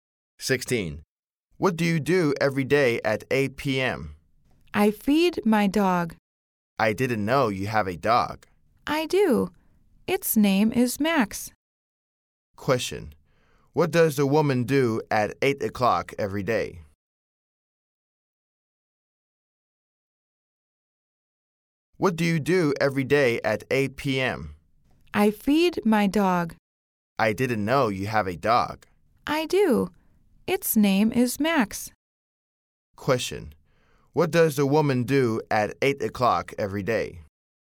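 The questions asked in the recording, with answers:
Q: Question: What does the woman do at 8 o'clock every day?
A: She feeds her dog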